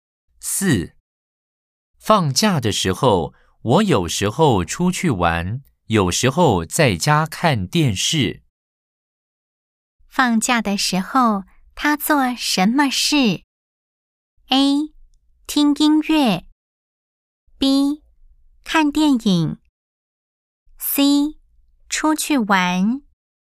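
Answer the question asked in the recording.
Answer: C: 出去玩。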